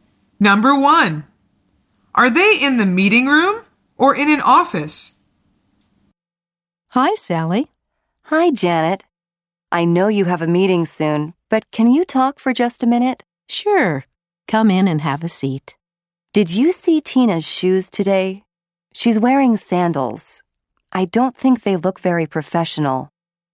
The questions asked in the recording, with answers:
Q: Are they in the meeting room or in an office?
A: The answer is in an office.